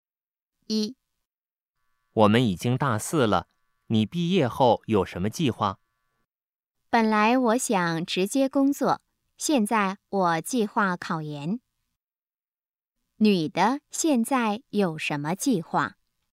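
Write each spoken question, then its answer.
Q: 女的现在有什么计划?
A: 考研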